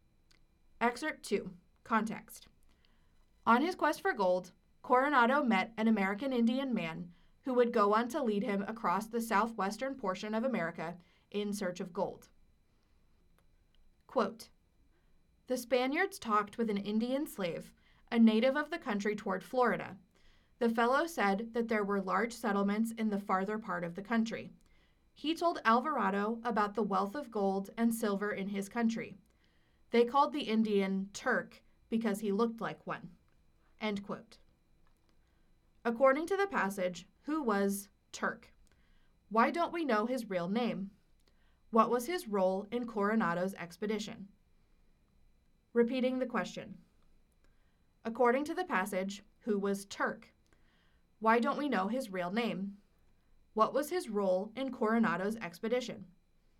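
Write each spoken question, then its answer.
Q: According to the passage, who was Turk?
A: An Indian slave, a native of the country toward Florida

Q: Why don't we know his real name?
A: The Spaniards called him Turk because he looked like one

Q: What was his role in Coronado's expedition?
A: He was a guide leading them in search of gold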